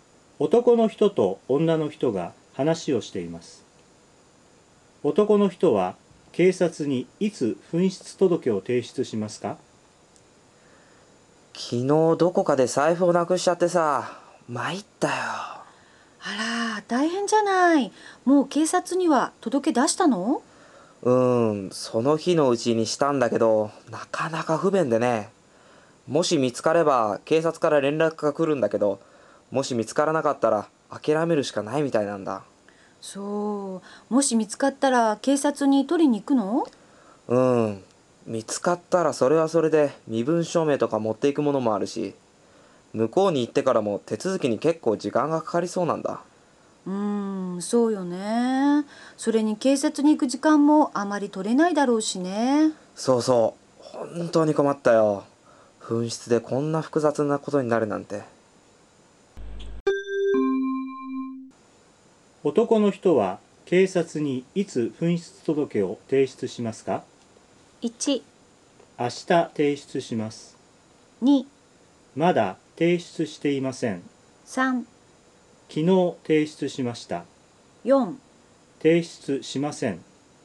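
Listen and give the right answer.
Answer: 3: 昨日提出しました。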